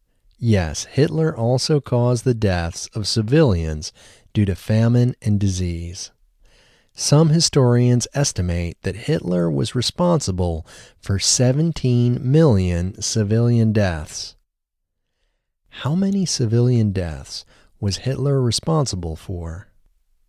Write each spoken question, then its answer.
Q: How many civilian deaths was Hitler responsible for?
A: Some historians estimate that Hitler was responsible for 17 million civilian deaths.